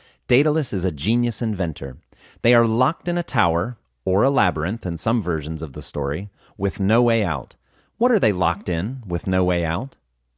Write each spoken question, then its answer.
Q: What are they locked in with no way out?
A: They are locked in a tower or a labyrinth with no way out.